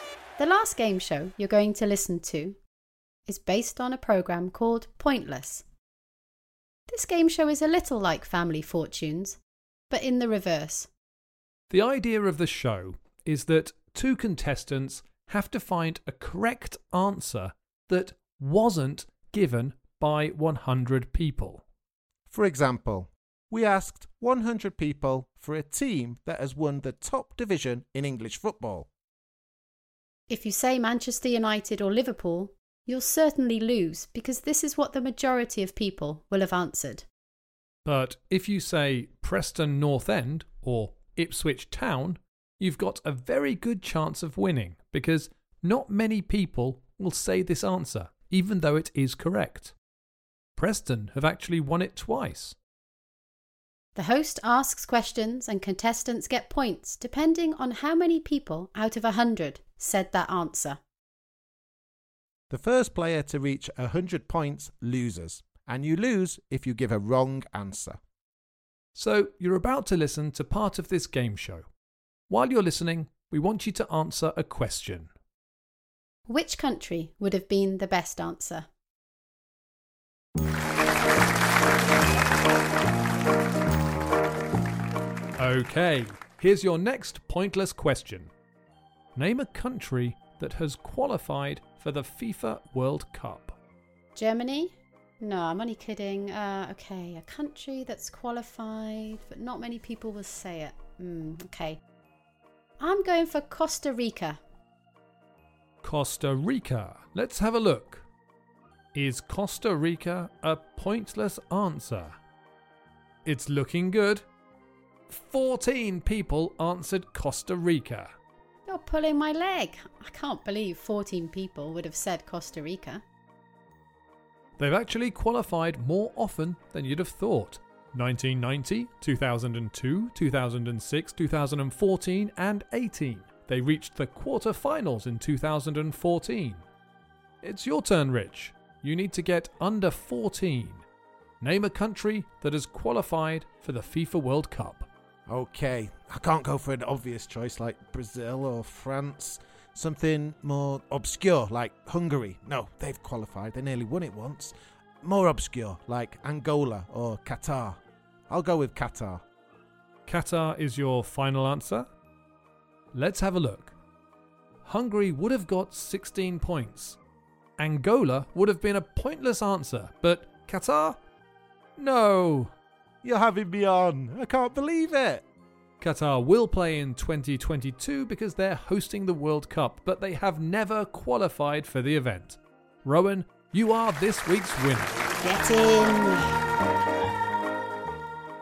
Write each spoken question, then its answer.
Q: Which country would have been the best answer?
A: The best answer would have been Angola because it was a pointless answer.